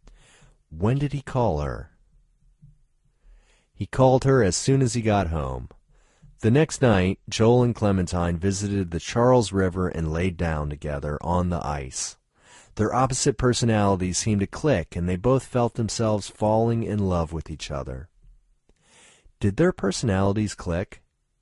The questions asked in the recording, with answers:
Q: Did their personalities click?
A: Yes, their personalities clicked.